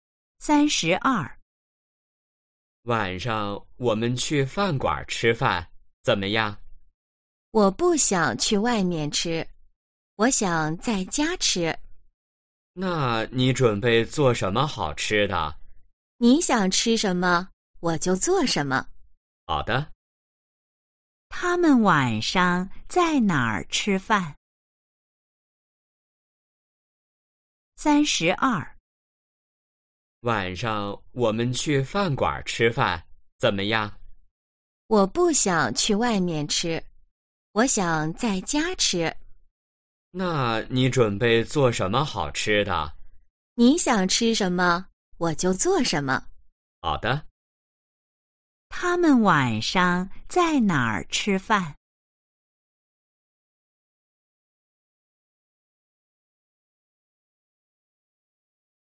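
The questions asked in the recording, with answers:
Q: 他们晚上在哪儿吃饭?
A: 在家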